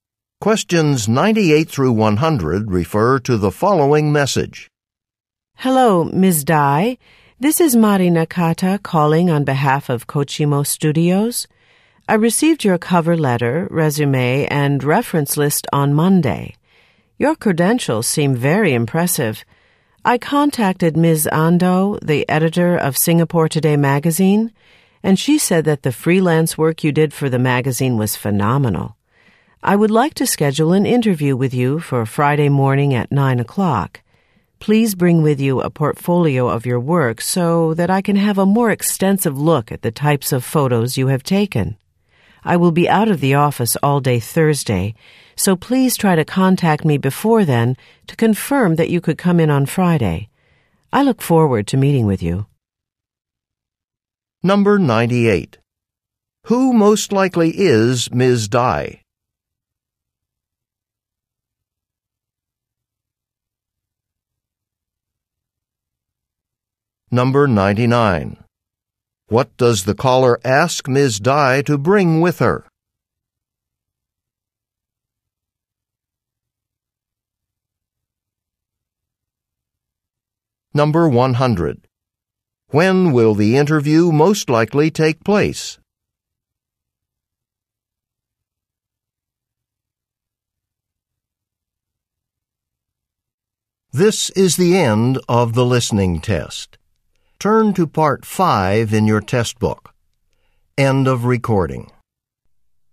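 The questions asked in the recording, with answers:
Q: Who most likely is Ms. Dai?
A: A photographer

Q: What does the caller ask Ms. Dai to bring with her?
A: A portfolio of her work

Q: When will the interview most likely take place?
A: Friday morning at 9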